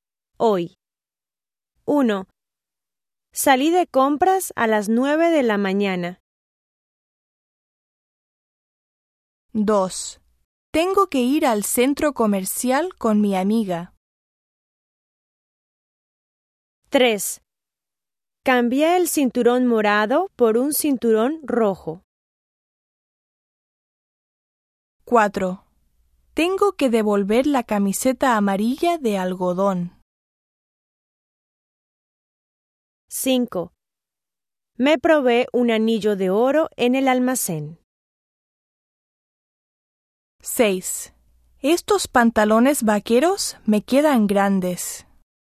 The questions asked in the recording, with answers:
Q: Salí de compras a las 9 de la mañana.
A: 1. Ayer.

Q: Tengo que ir al centro comercial con mi amiga.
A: 2. Hoy.

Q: Cambié el cinturón morado por un cinturón rojo.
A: 3. Ayer.

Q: Tengo que devolver la camiseta amarilla de algodón.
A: 4. Hoy.

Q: Me probé un anillo de oro en el almacén.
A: 5. Ayer.

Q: Estos pantalones vaqueros me quedan grandes.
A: 6. Hoy.